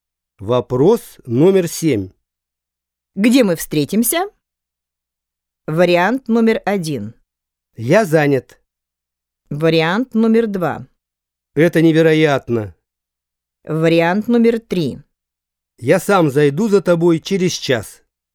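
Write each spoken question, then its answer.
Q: Где мы встретимся?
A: 3: Я сам зайду за тобой через час.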